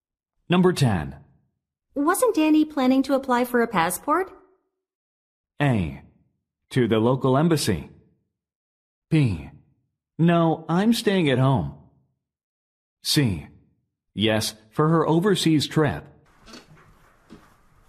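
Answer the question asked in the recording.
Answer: C: Yes, for her overseas trip.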